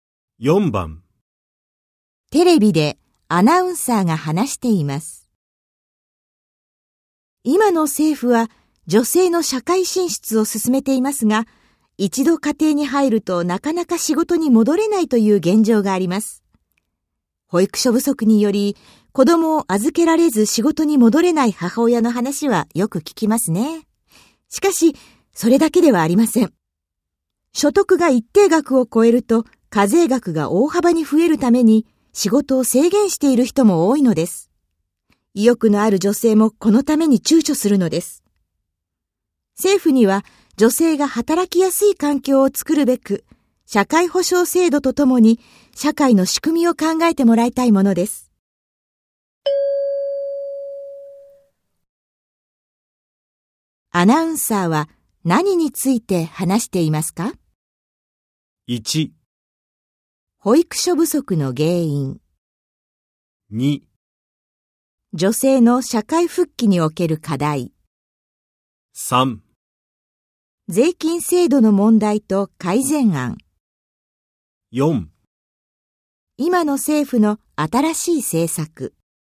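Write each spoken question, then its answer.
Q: アナウンサーは何について話していますか?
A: 2: 女性の社会復帰における課題。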